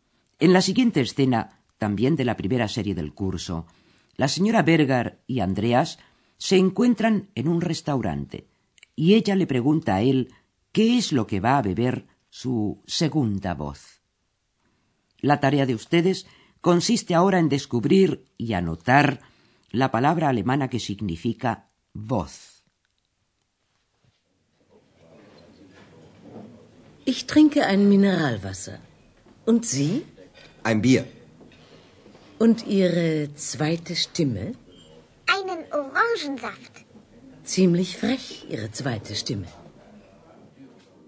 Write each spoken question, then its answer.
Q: La tarea de ustedes consiste ahora en descubrir y anotar la palabra alemana que significa voz.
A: esa es la palabra Stimme.